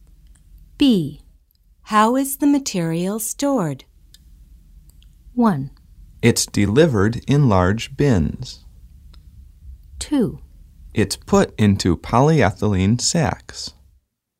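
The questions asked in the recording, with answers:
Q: How is the material stored?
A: 2: It's put into polyethylene sacks.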